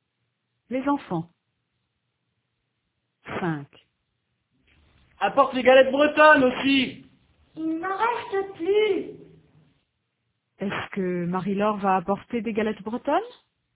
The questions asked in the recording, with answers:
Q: Est-ce que Marie-Laure va apporter des galettes bretonnes?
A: Non, il n'en reste plus.